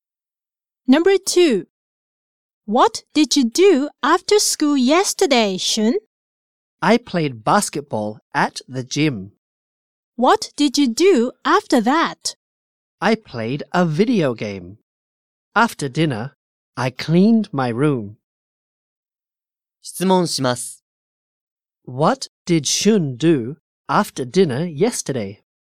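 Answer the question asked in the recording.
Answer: He cleaned his room.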